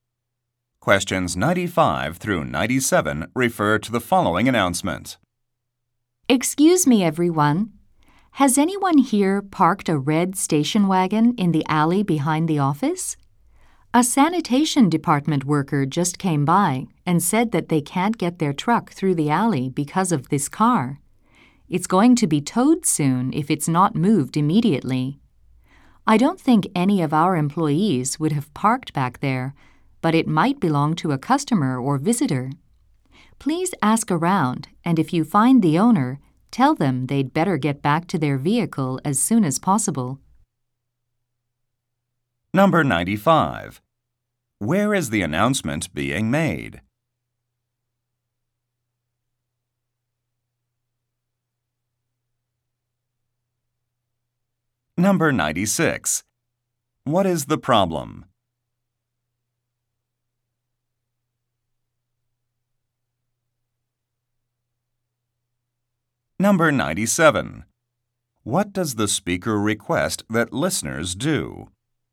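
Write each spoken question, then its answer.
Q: Where is the announcement being made?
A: In an office

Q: What is the problem?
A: A car is blocking the alley

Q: What does the speaker request that listeners do?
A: Ask around to find the car's owner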